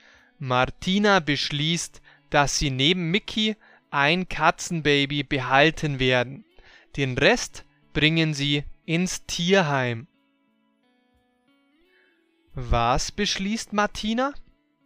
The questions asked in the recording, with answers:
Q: Was beschließt Martina?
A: Sie beschließt, dass sie neben Mickey ein Katzenbaby behalten werden.